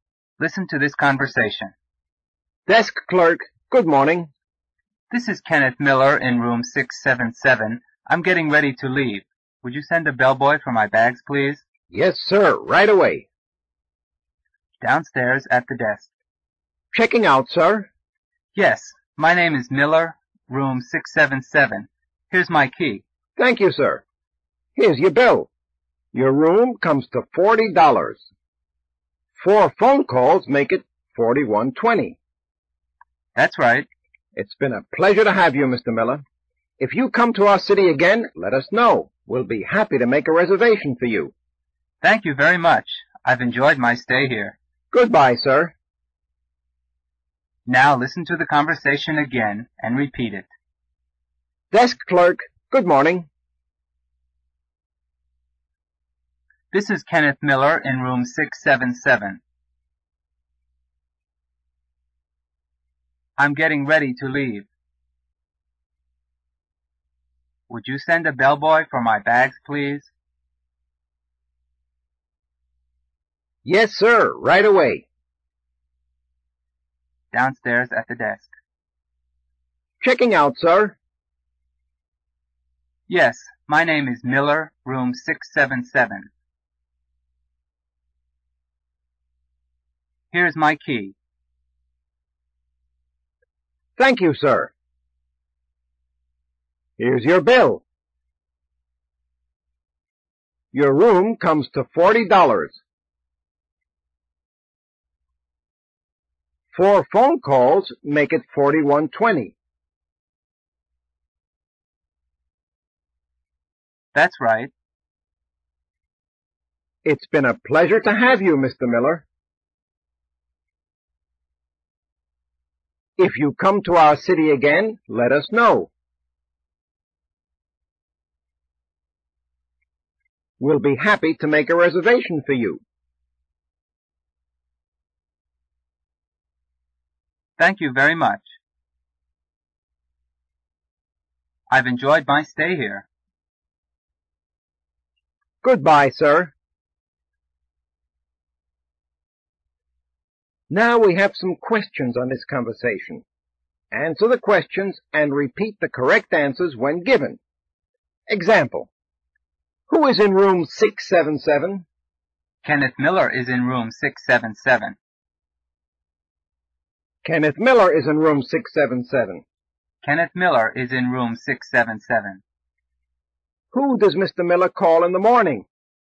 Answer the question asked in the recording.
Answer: He calls the desk clerk.